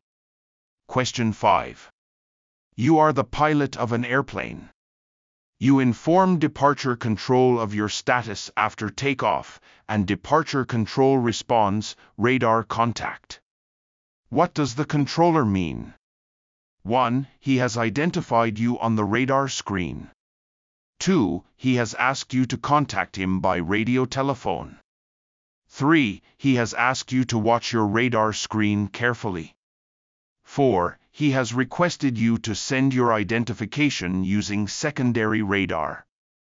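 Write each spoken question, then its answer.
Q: What does the controller mean?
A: 1: He has identified you on the radar screen.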